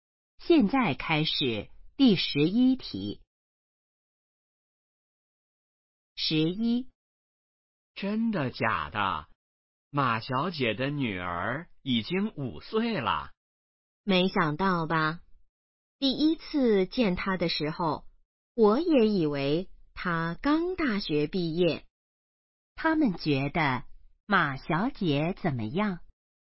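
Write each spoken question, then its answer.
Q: 他们觉得马小姐怎么样?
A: 看起来很年轻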